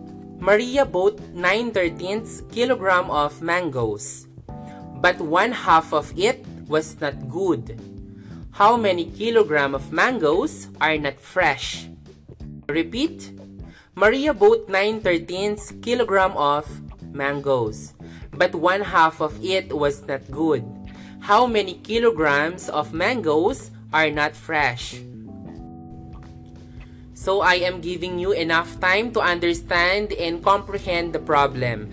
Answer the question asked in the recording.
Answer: 926 kilogram of mangoes are not good.